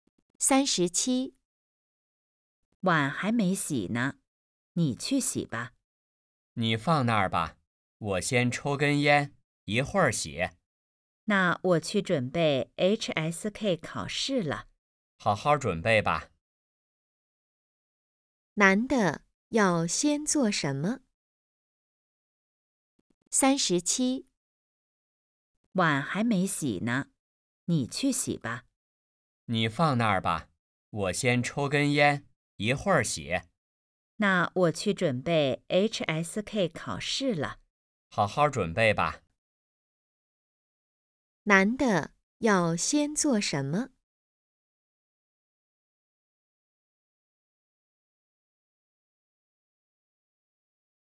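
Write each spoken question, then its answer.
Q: 男的要先做什么?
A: 抽烟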